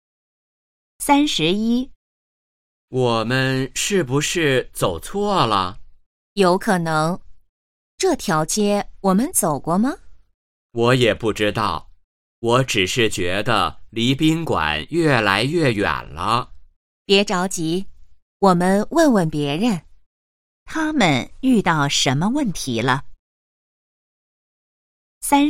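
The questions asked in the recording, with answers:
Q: 他们遇到什么问题了。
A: 迷路了(走错路了)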